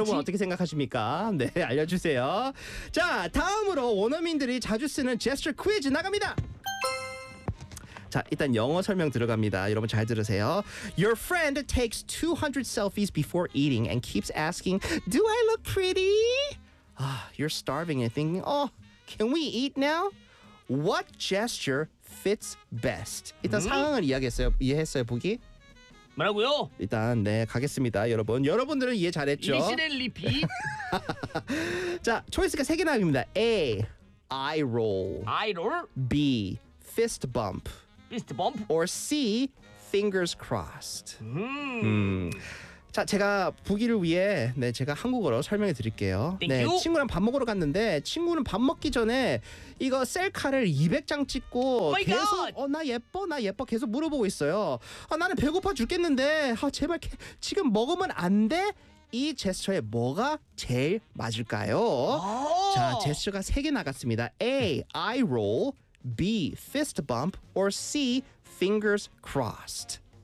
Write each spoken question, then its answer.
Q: What gesture fits best?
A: 그래서 정답은 아이롤 맞습니다.